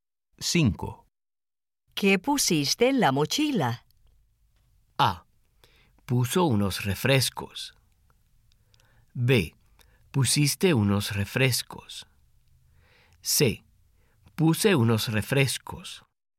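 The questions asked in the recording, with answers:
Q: ¿Qué pusiste en la mochila?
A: C: Puse unos refrescos.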